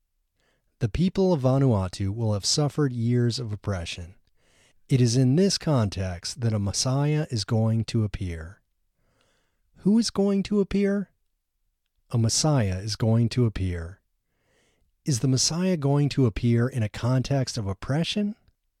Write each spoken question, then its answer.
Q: Who is going to appear?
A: A Messiah is going to appear.